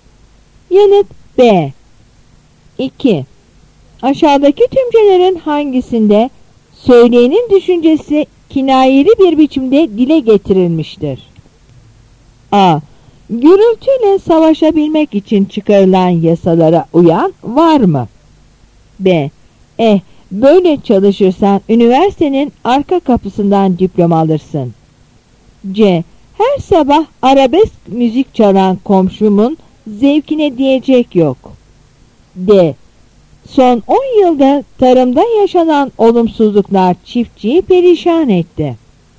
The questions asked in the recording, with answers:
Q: Aşağıdaki tümcelerin hangisinde söyleyenin düşüncesi kinayeli bir biçimde dile getirilmiştir?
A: Yanıt C.